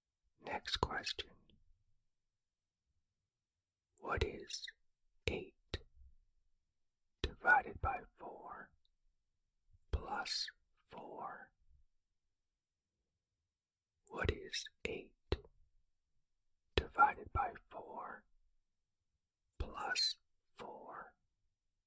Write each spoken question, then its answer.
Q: What is 8 divided by 4 plus 4?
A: The answer is 6.